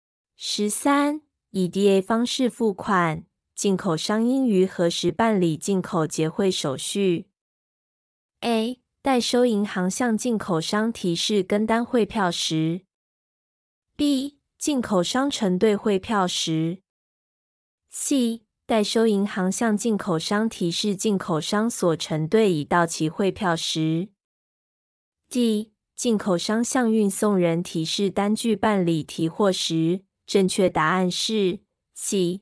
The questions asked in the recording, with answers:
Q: 以 DA 方式付款,进口商应于何时办理进口结汇手续?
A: 正确答案是 C.